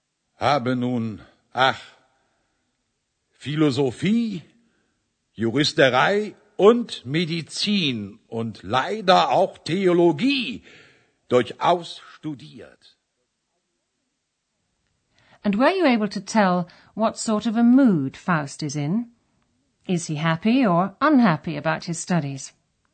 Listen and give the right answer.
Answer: shows he's unhappy